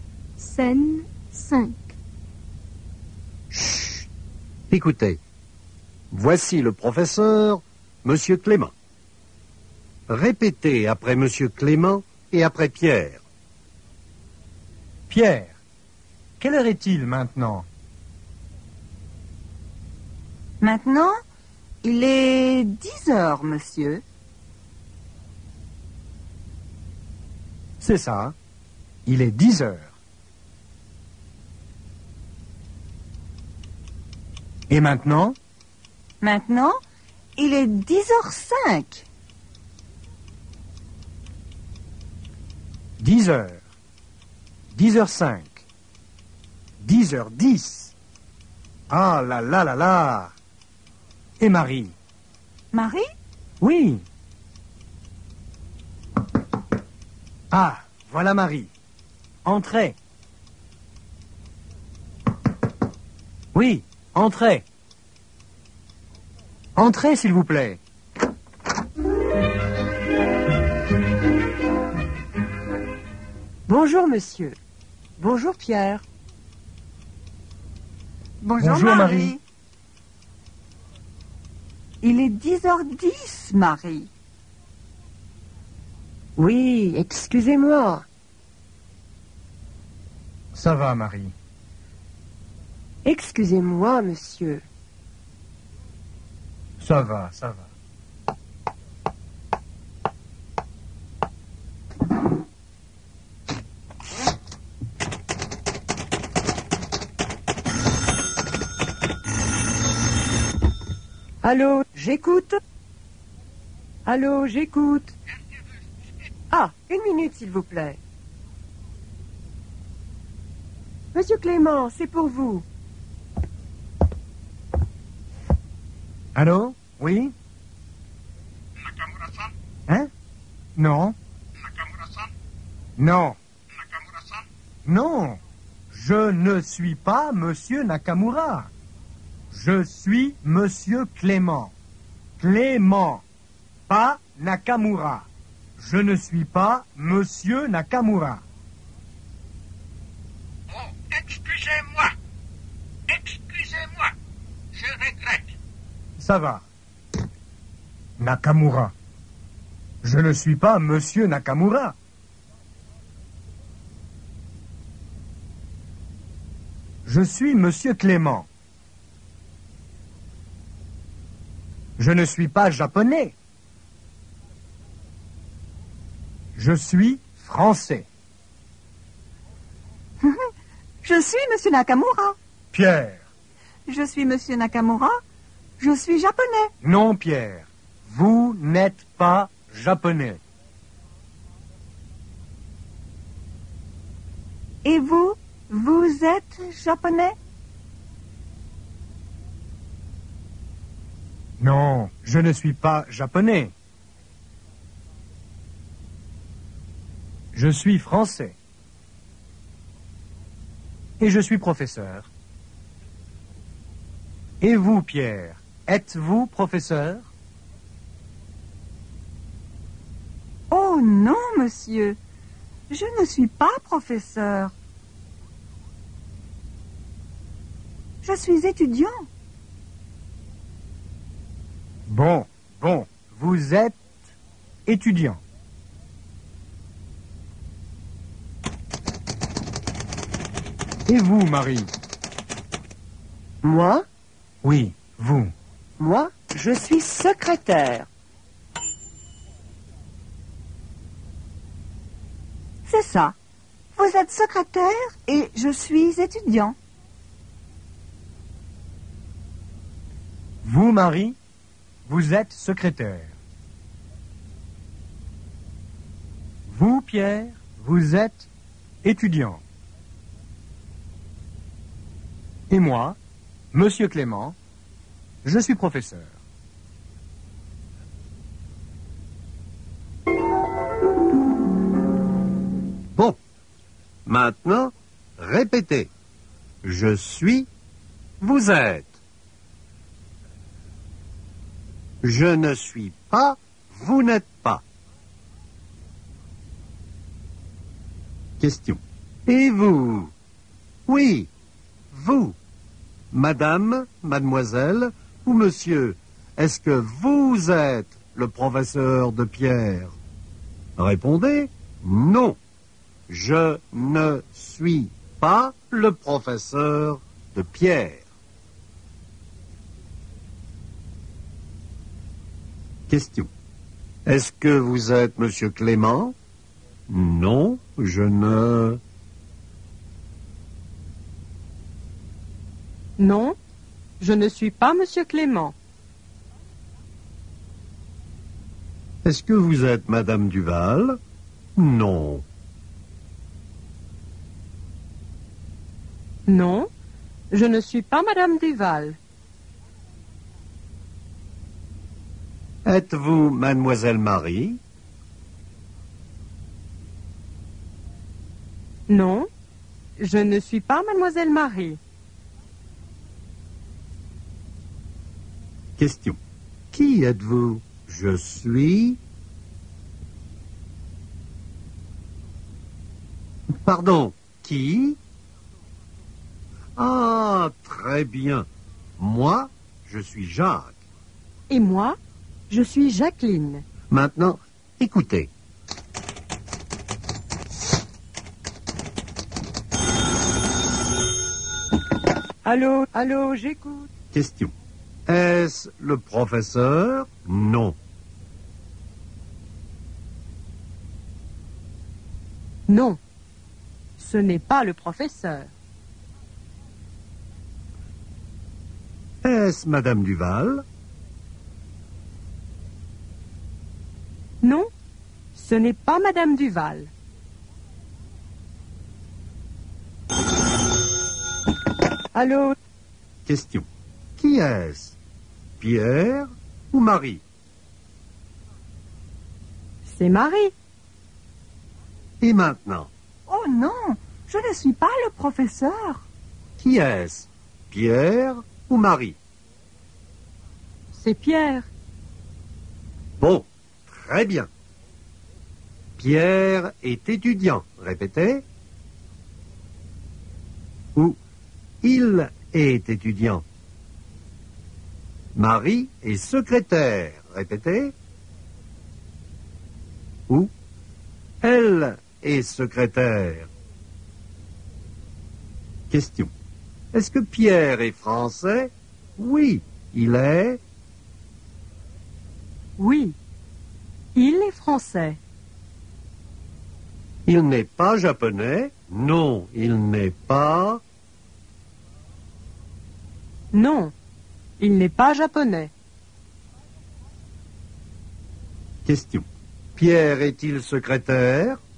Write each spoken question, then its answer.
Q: Pierre est-il secrétaire?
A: Non, il n'est pas secrétaire.